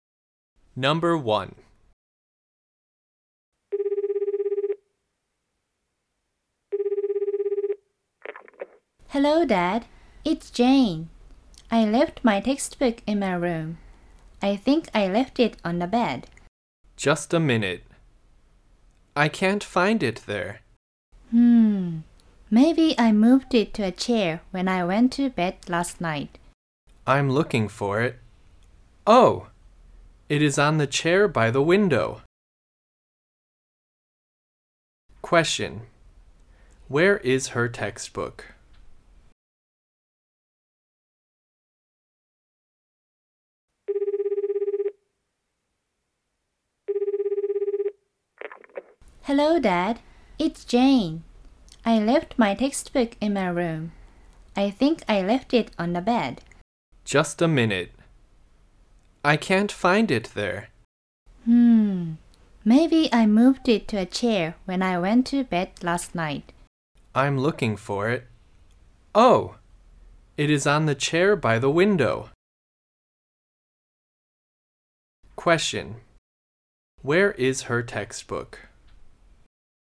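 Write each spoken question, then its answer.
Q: Where is her textbook?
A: On the chair by the window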